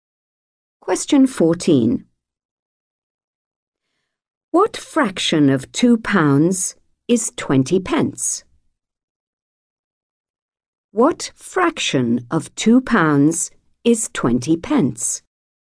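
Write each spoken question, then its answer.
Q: What fraction of 2 pounds is 20 pence?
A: 1/10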